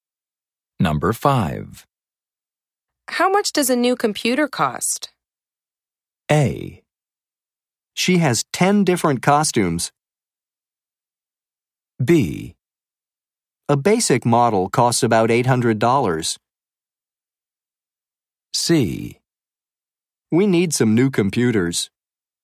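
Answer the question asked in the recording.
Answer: B: A basic model costs about $800.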